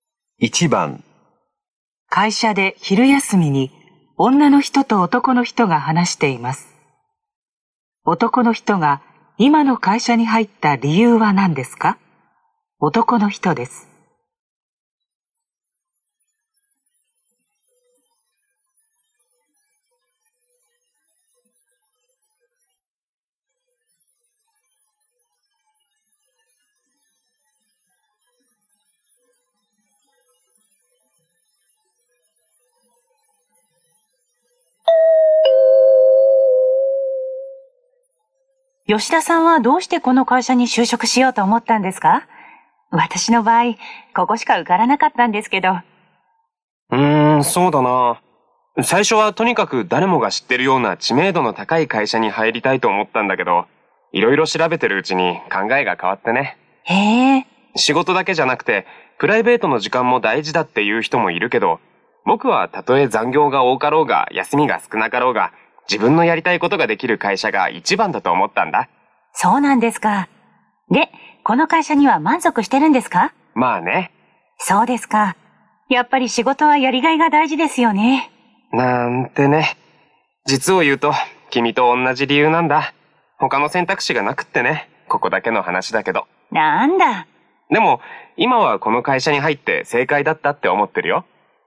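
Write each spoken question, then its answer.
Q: 男の人が今の会社に入った理由は何ですか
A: 他に受かった会社がなかったから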